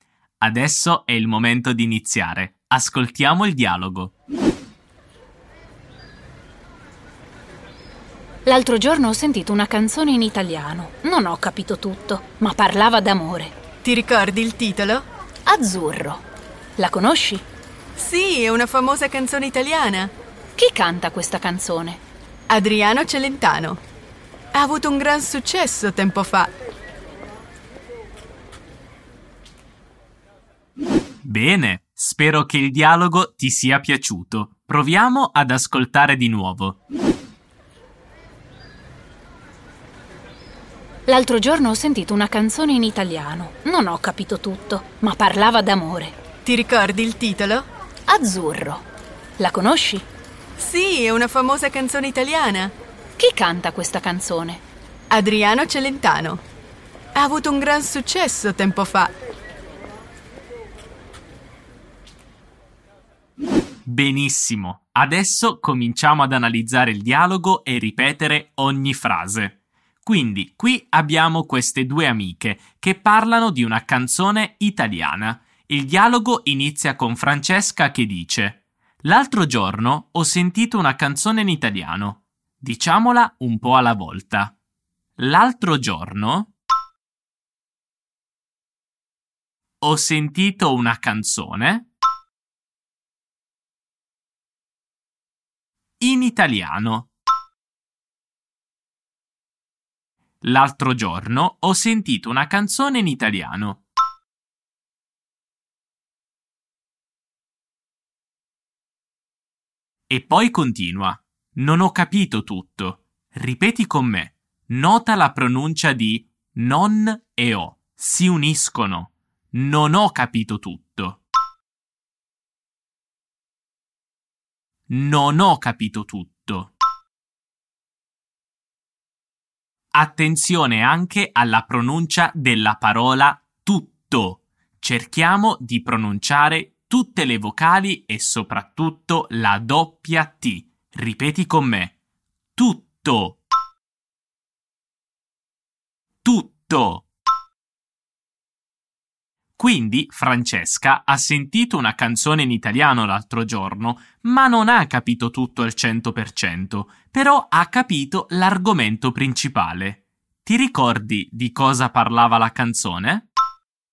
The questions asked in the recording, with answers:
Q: Ti ricordi di cosa parlava la canzone?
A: Parlava d'amore.